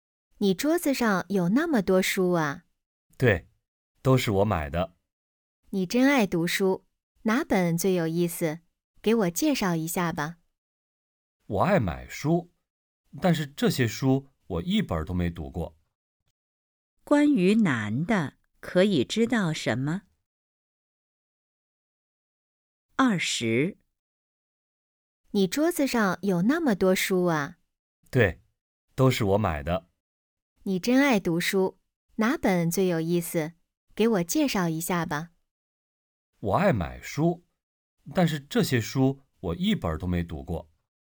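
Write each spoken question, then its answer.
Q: 关于男的,可以知道什么?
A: 他爱买书,但这些书一本都没读过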